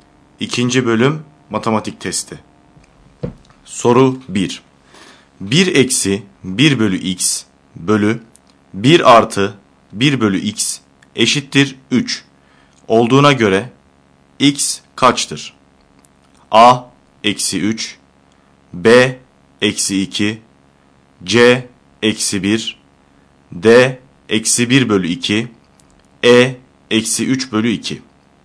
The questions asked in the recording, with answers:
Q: Olduğuna göre x kaçtır?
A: Doğru yanıt B şıkkı.